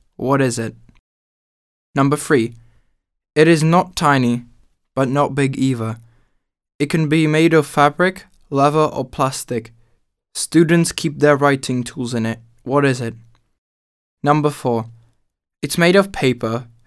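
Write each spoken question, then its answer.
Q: What is it?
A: a pencil case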